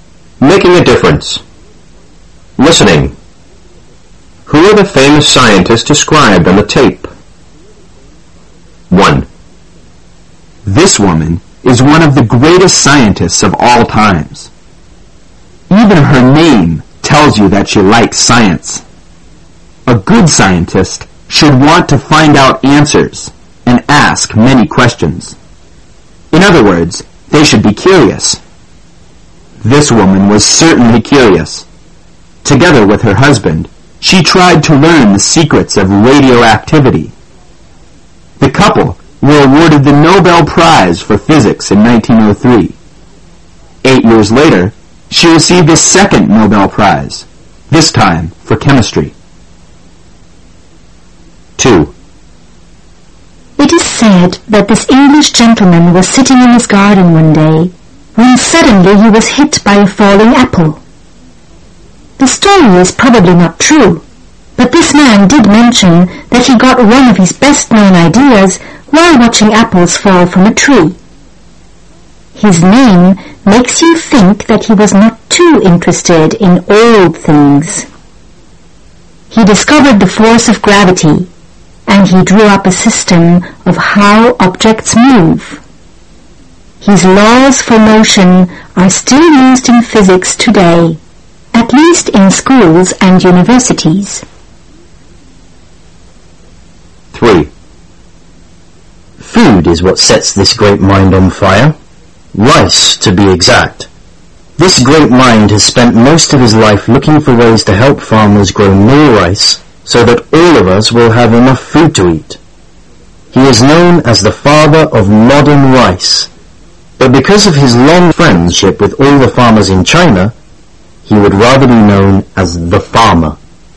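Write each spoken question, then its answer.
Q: Who are the famous scientists described on the tape?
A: Marie Curie

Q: Who are the famous scientists described on the tape?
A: Isaac Newton

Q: Who are the famous scientists described on the tape?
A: Yuan Longping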